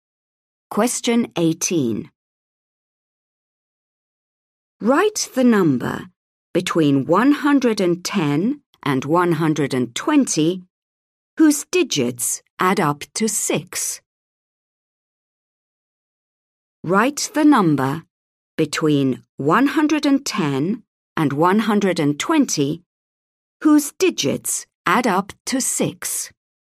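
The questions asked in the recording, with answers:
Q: Write the number between 110 and 120 whose digits add up to 6.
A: 114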